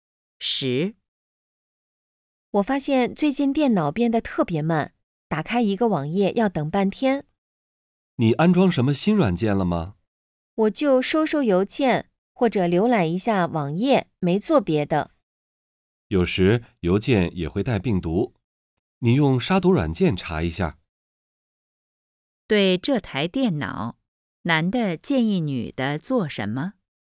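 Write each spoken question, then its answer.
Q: 对这台电脑,男的建议女的做什么?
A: 用杀毒软件查一下病毒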